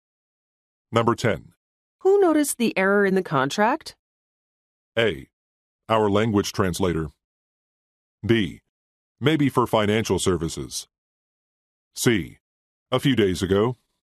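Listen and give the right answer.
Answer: A: Our language translator.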